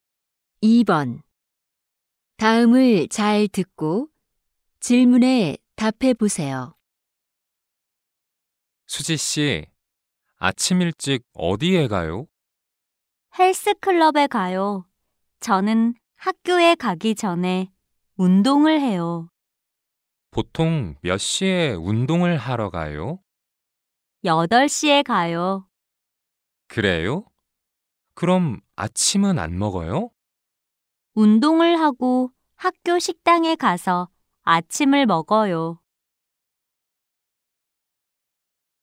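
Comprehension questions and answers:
[20-1~20-3] 다음을 잘 듣고 질문에 답해 보세요.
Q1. 수지 씨는 학교에 가기 전에 무엇을 해요?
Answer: 운동

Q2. 수지 씨는 아침을 어디에서 먹어요?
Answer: 학교 식당

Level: 1B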